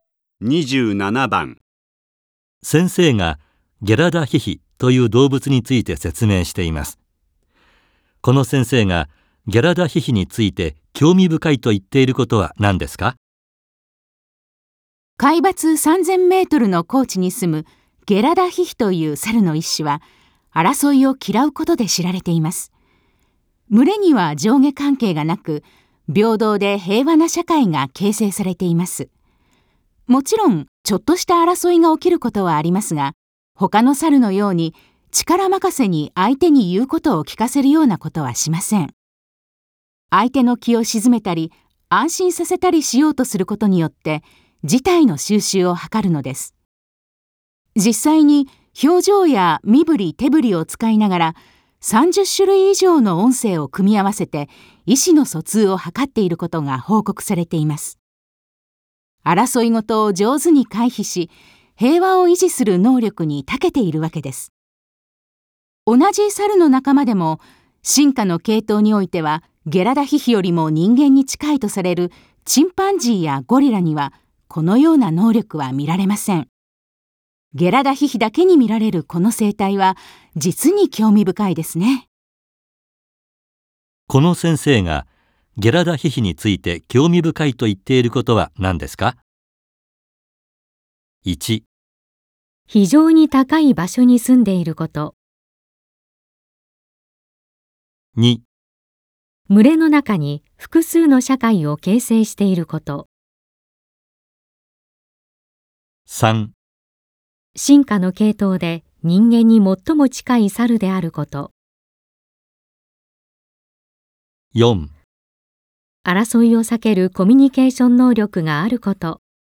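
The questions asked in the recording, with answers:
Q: この先生がゲラダヒヒについて興味深いと言っていることは何ですか?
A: 4: 争いを避けるコミュニケーション能力があること。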